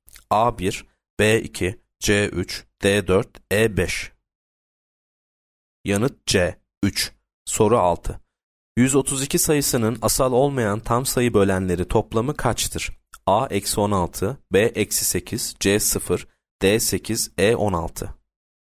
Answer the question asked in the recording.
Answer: Yanıt A eksi 16.